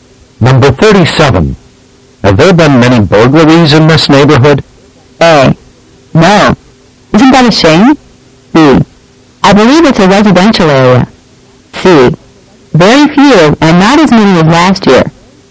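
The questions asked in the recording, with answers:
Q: Have there been many burglaries in this neighborhood?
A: C: Very few, and not as many as last year.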